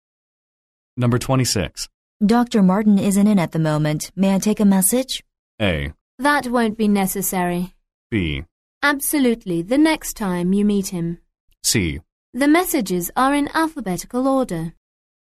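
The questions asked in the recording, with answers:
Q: May I take a message?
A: A: That won't be necessary.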